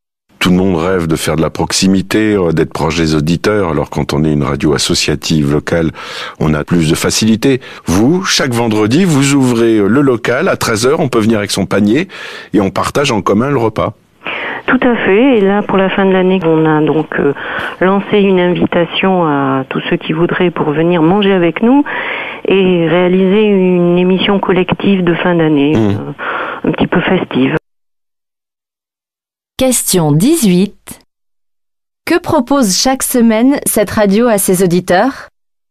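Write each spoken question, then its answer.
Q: Que propose chaque semaine cette radio à ses auditeurs ?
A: Un repas partagé en commun dans son local chaque vendredi à 13h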